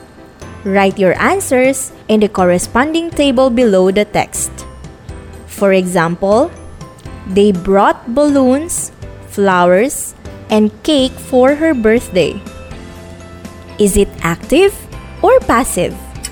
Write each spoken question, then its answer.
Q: Is it active or passive?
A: Very good! It's active.